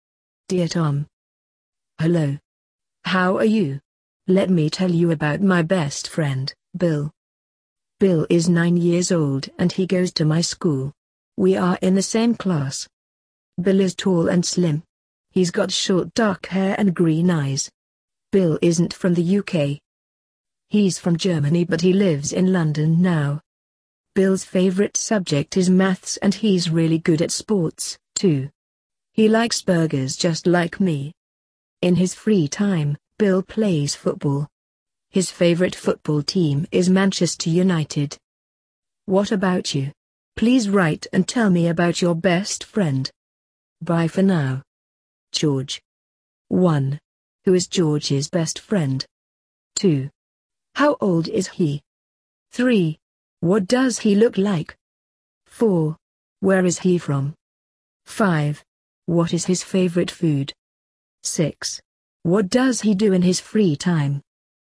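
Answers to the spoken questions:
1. Bill
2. 9 years old
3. He's tall and slim with short dark hair and green eyes
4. Germany
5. Burgers
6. He plays football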